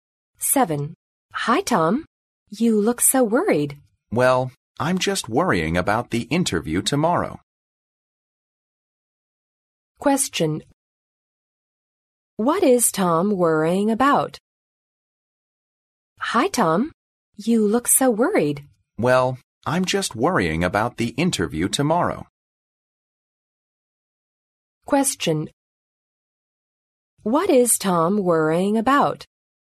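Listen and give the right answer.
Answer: The interview tomorrow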